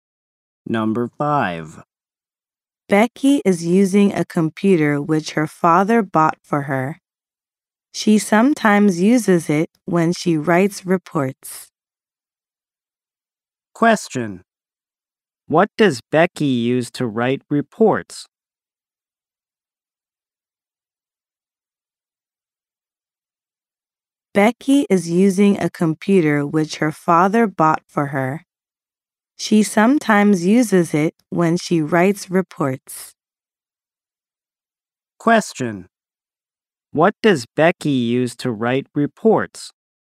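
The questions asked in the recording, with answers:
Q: What does Becky use to write reports?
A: A computer her father bought for her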